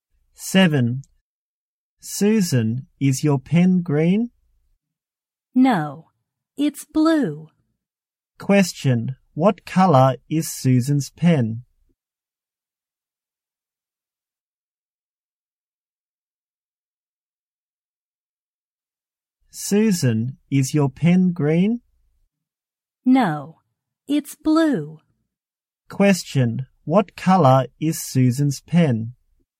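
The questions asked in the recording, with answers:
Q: What color is Susan's pen?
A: Blue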